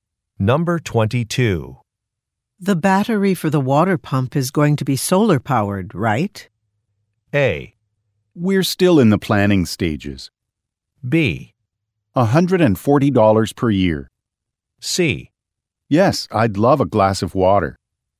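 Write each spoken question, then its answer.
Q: The battery for the water pump is going to be solar powered, right?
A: A: We're still in the planning stages.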